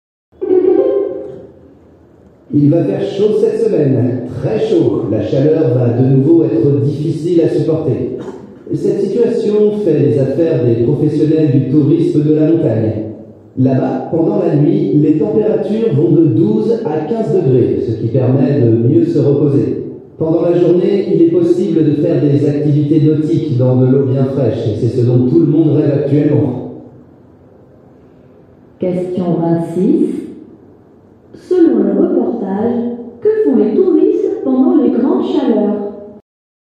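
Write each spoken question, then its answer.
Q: Selon le reportage, que font les touristes pendant les grandes chaleurs?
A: Ils vont à la montagne, au frais, et font des activités nautiques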